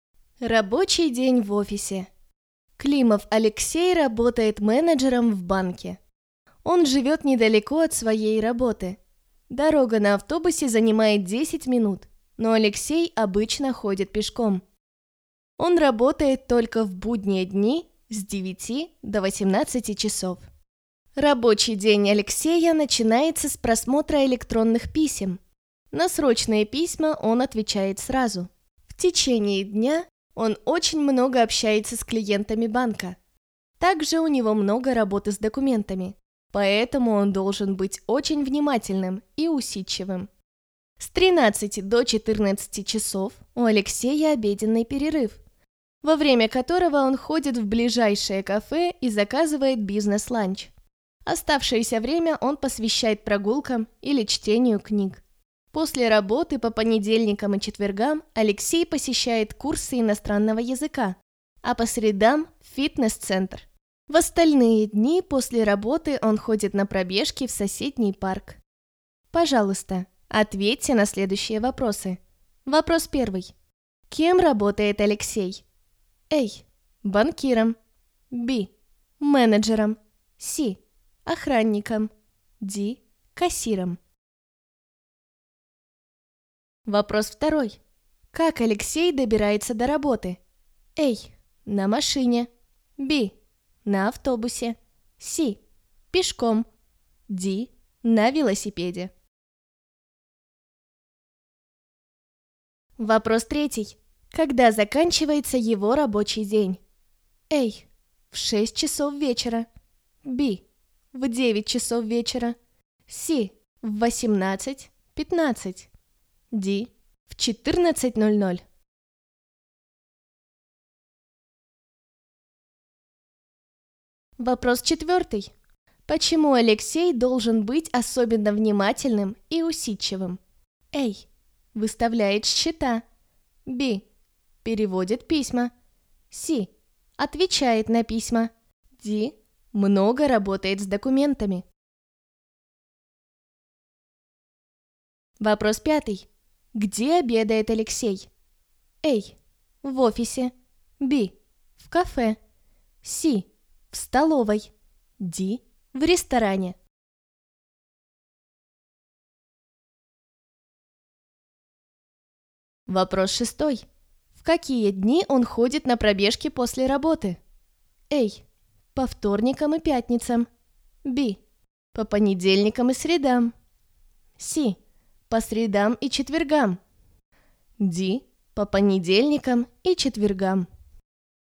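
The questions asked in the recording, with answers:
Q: Кем работает Алексей?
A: B: Менеджером.

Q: Как Алексей добирается до работы?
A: C: Пешком.

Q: Когда заканчивается его рабочий день?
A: A: В 6 часов вечера.

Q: Почему Алексей должен быть особенно внимательным и усидчивым?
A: D: Много работает с документами.

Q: Где обедает Алексей?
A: B: В кафе.

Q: В какие дни он ходит на пробежки после работы?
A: A: По вторникам и пятницам.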